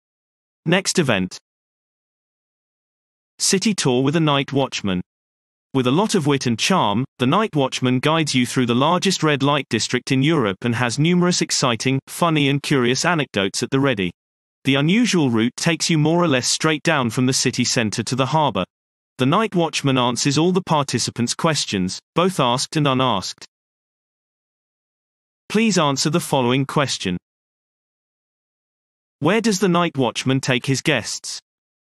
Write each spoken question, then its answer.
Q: Where does the night watchman take his guests?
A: The night watchman leads his guests from the city center to the harbor directly into the largest red light district in Europe.